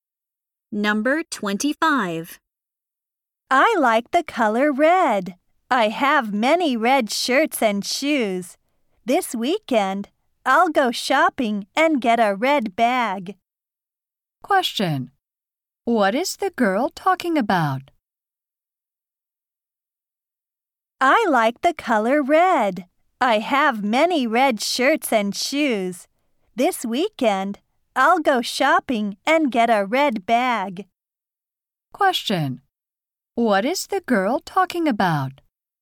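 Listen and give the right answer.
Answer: Her favorite color, red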